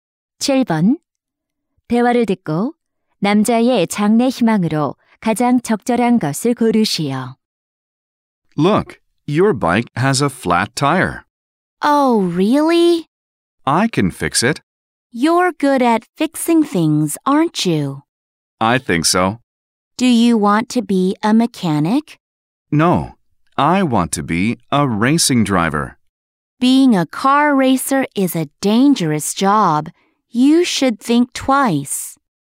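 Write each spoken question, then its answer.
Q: 대화를 듣고 남자의 장래 희망으로 가장 적절한 것을 고르시오.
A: 자동차 경주 선수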